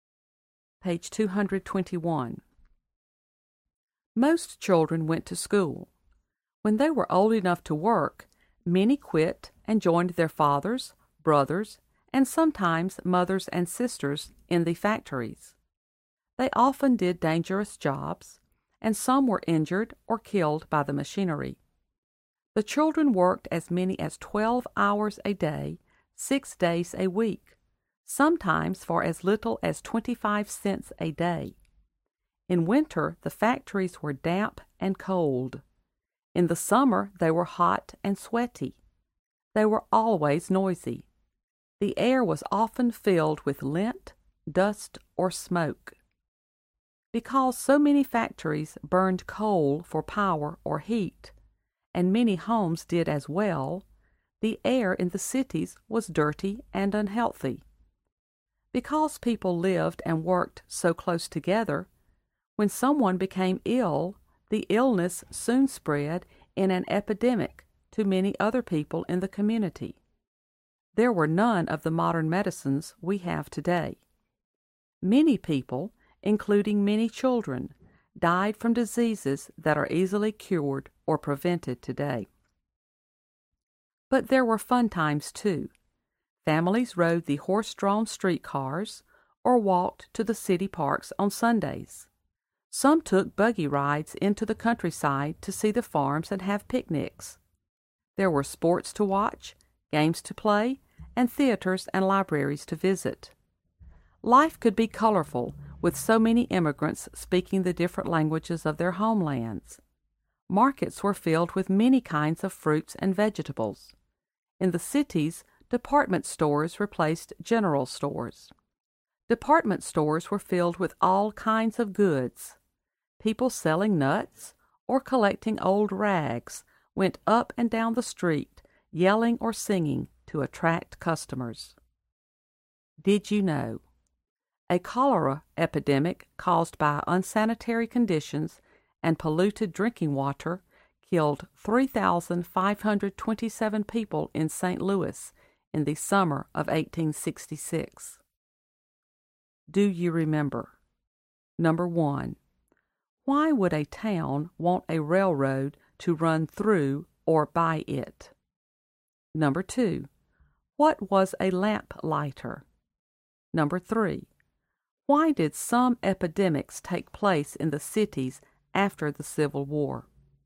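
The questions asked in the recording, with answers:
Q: Why did some epidemics take place in the cities after the Civil War?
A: Because people lived and worked so close together, so one person's illness soon spread to many others, and there were no modern medicines.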